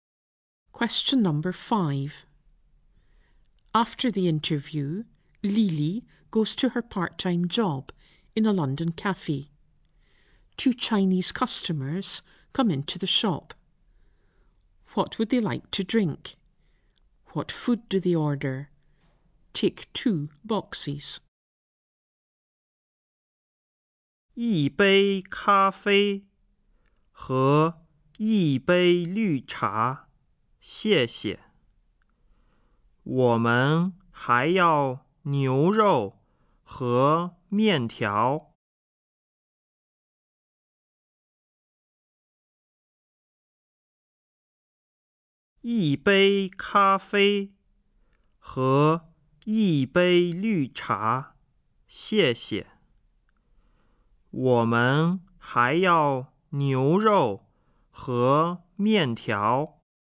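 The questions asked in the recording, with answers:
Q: What would they like to drink?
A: A cup of coffee and a cup of green tea

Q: What food do they order?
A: Beef and noodles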